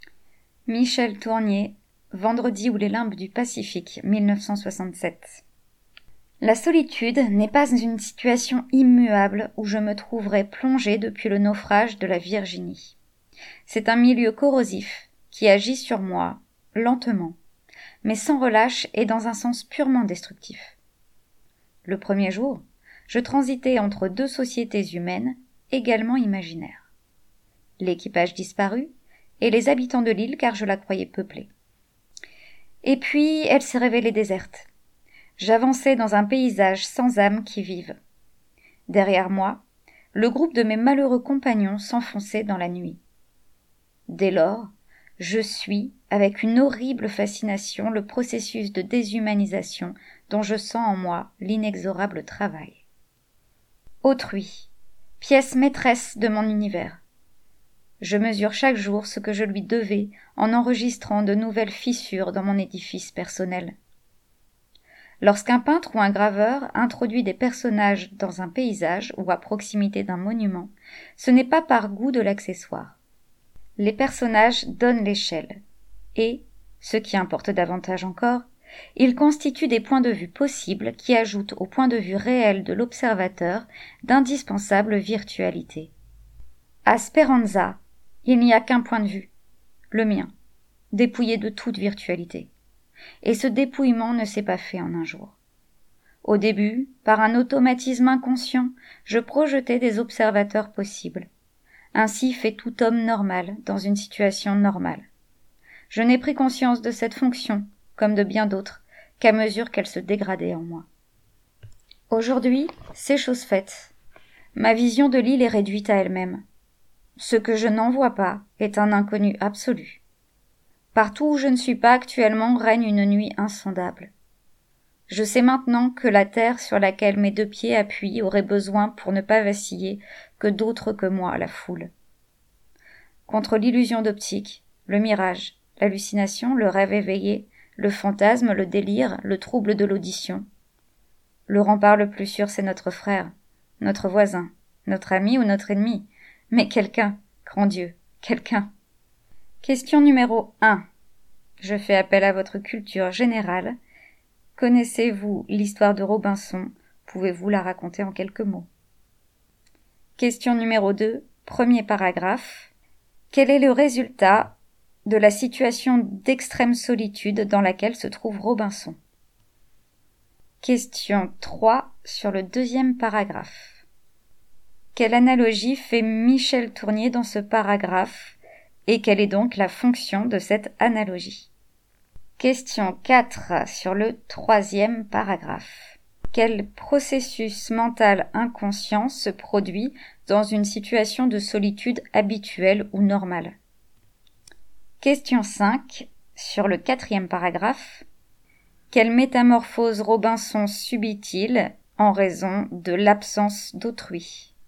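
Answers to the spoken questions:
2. Un processus de déshumanisation lent et destructif : la solitude le corrode et fissure son édifice personnel
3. Il compare autrui aux personnages qu'un peintre ou un graveur place dans un paysage : ils donnent l'échelle et ajoutent d'autres points de vue possibles à celui de l'observateur
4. On projette automatiquement des observateurs possibles
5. Sa vision est réduite à son seul point de vue : ce qu'il ne voit pas devient un inconnu absolu, et il perd sa protection contre les illusions et les hallucinations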